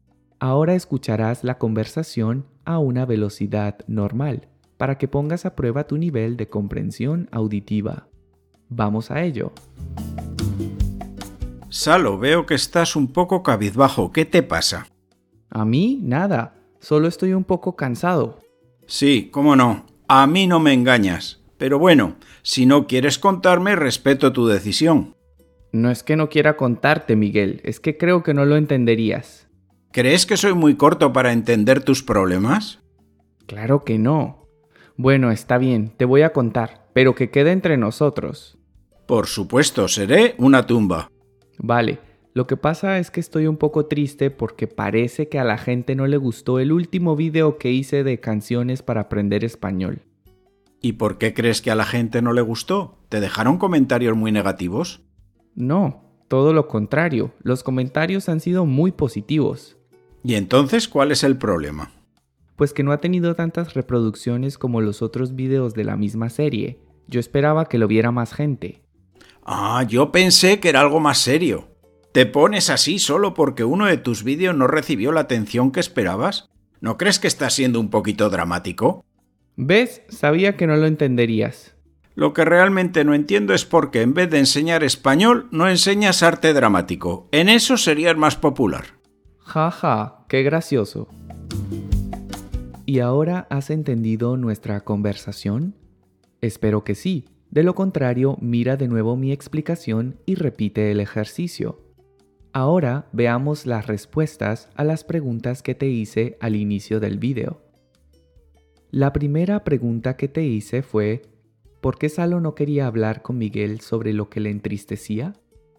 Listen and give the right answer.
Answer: porque creía que Miguel no lo entendería.